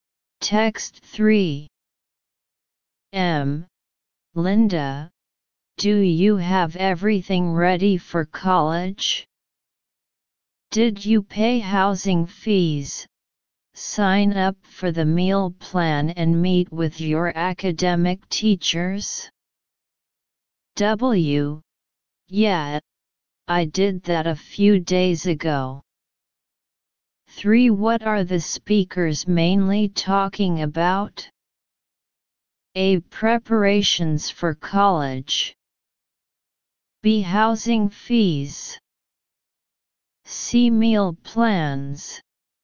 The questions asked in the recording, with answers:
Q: What are the speakers mainly talking about?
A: Answer, A.